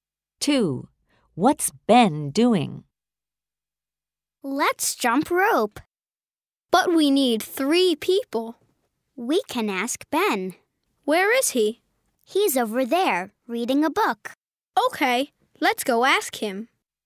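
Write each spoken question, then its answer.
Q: What's Ben doing?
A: Reading a book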